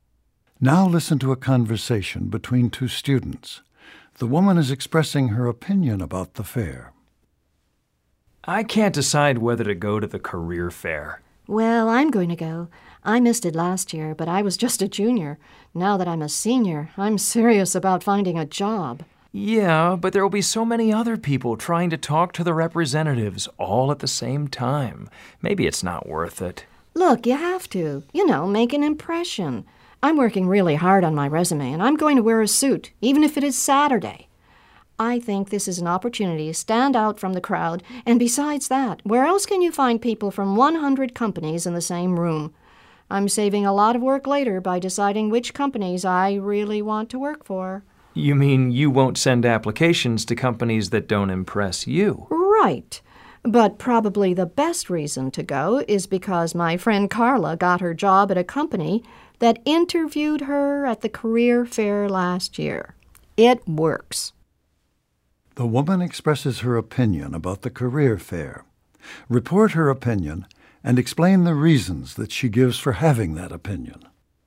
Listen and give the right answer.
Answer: The woman has a very positive opinion about the career fair